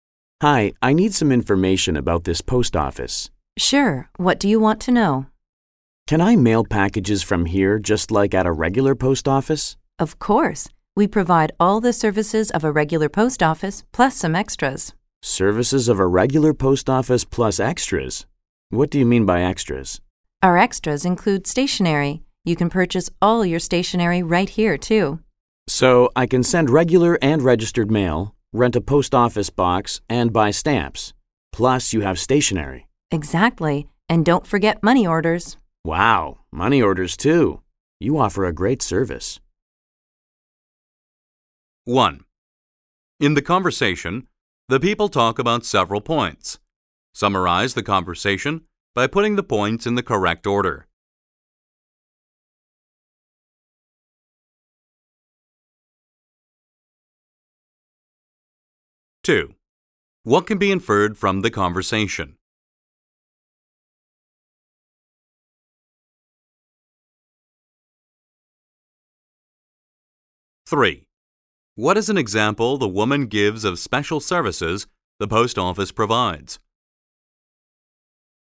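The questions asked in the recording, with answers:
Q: What is an example the woman gives of special services the post office provides?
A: Selling stationery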